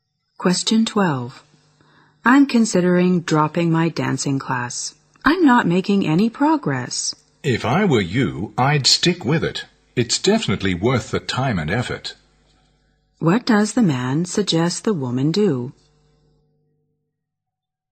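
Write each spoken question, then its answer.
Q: What does the man suggest the woman do?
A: Continue the dancing class.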